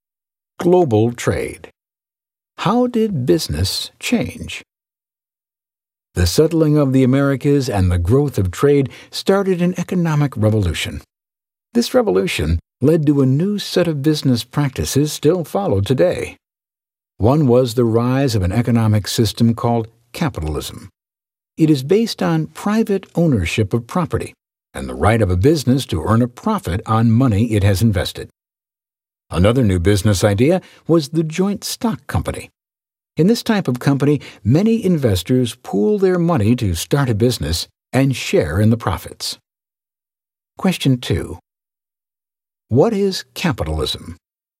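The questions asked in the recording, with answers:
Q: What is capitalism?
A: An economic system based on private ownership of property and the right of a business to earn a profit on money it has invested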